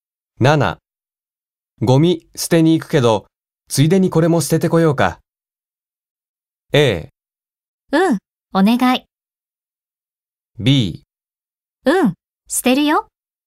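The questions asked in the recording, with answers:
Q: ゴミ捨てに行くけど、ついでにこれも捨ててこようか。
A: A: うん、お願い。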